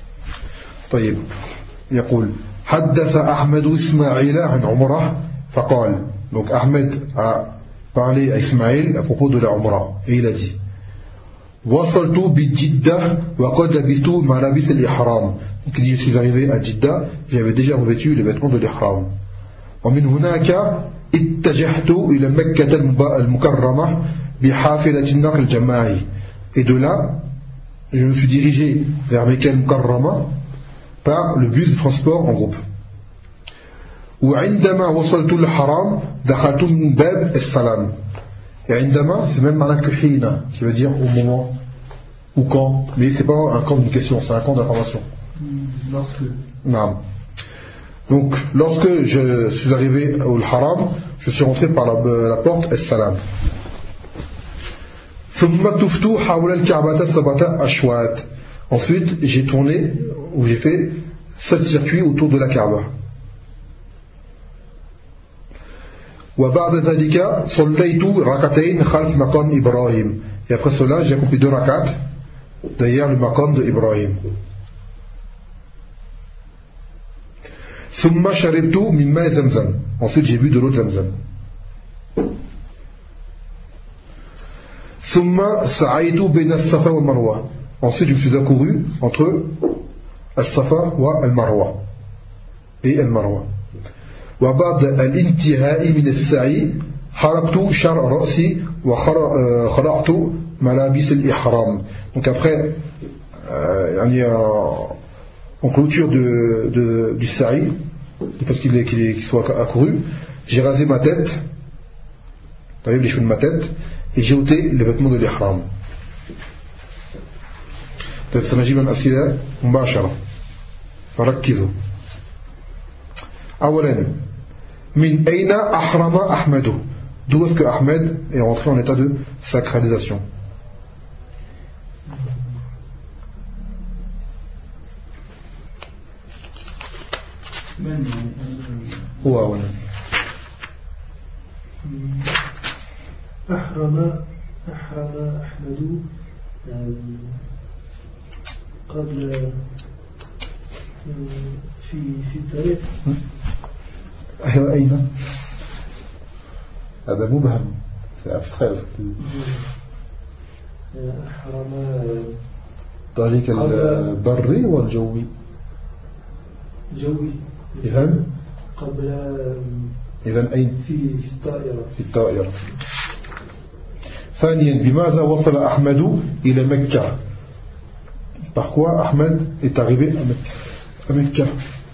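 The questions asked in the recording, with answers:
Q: Par quoi Ahmed est arrivé à Mecca?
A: Par le bus de transport collectif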